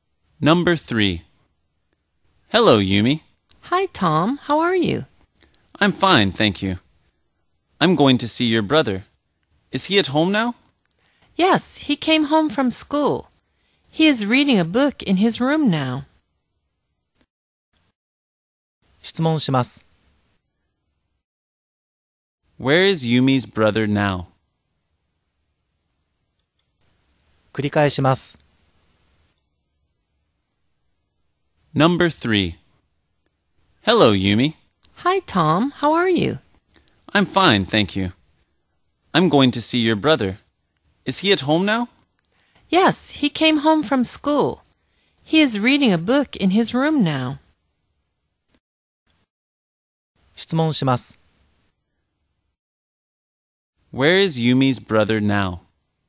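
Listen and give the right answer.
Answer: In his room at home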